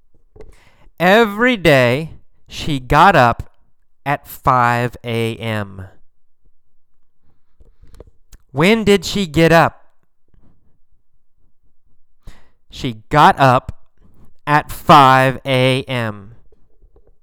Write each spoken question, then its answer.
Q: When did she get up?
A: She got up at 5 a.m.